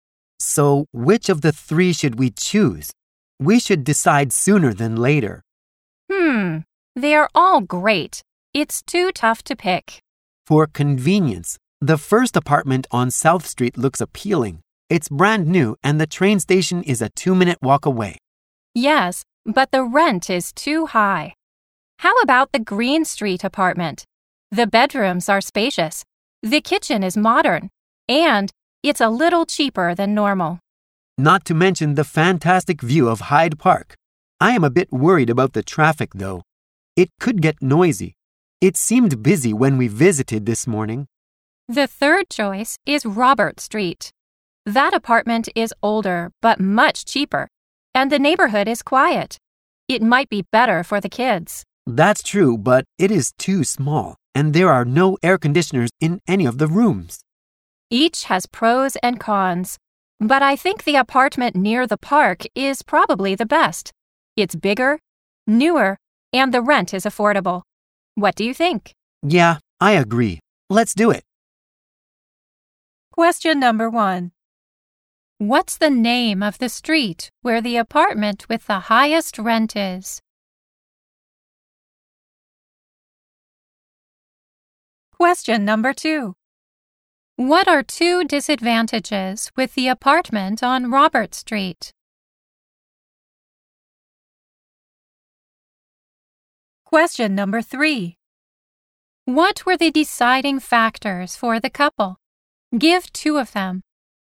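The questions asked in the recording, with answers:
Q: What's the name of the street where the apartment with the highest rent is?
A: South Street

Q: What are two disadvantages with the apartment on Robert Street?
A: It is too small and there are no air conditioners.

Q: What were the deciding factors for the couple? Give two of them.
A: It's bigger, newer, and the rent is affordable.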